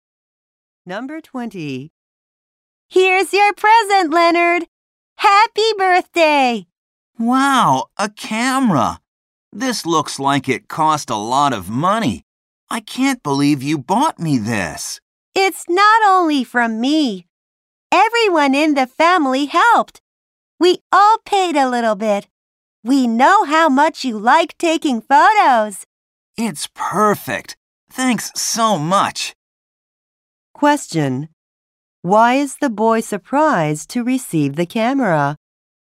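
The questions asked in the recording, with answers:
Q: Why is the boy surprised to receive the camera?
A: It looks like it cost a lot of money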